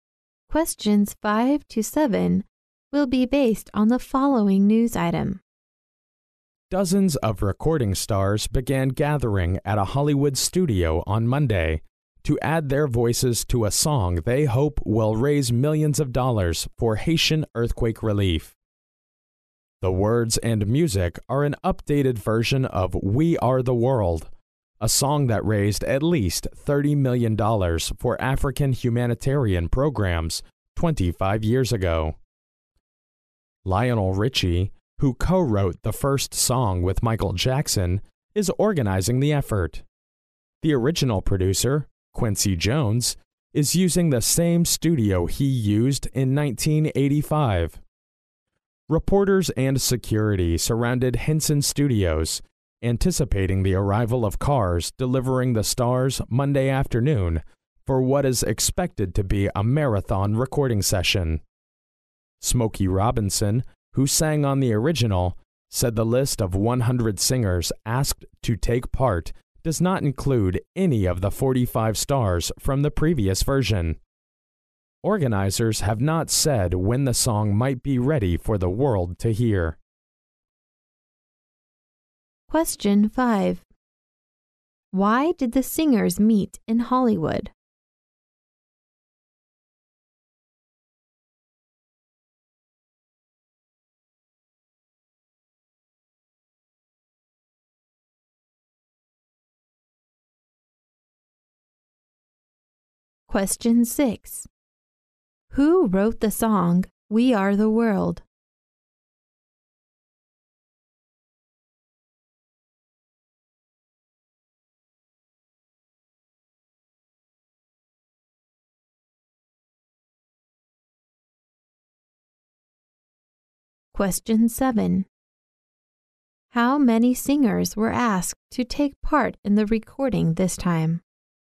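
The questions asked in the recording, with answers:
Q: Why did the singers meet in Hollywood?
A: To record a song to raise money for Haitian earthquake relief

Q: How many singers were asked to take part in the recording this time?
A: 100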